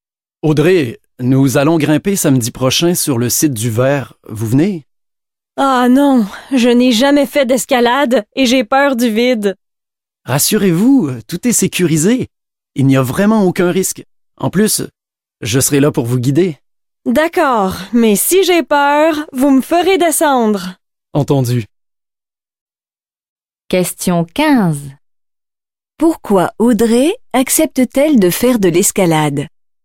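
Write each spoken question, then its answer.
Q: Pourquoi Audrey accepte-t-elle de faire de l'escalade?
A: Parce que tout est sécurisé et qu'on la guidera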